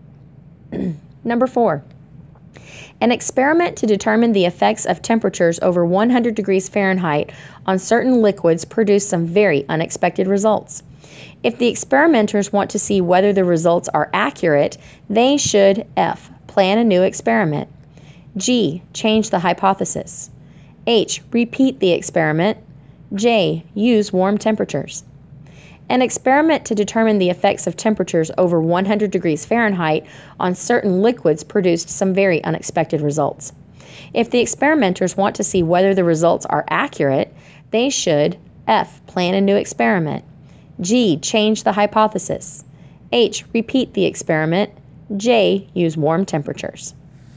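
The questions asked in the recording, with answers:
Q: If the experimenters want to see whether the results are accurate, they should F.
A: H: repeat the experiment.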